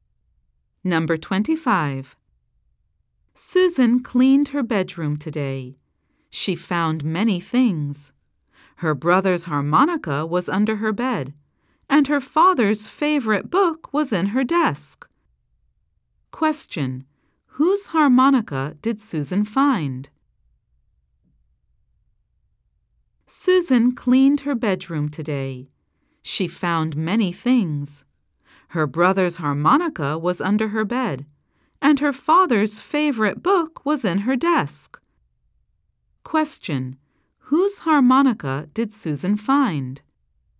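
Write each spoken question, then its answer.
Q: Whose harmonica did Susan find?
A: Her brother's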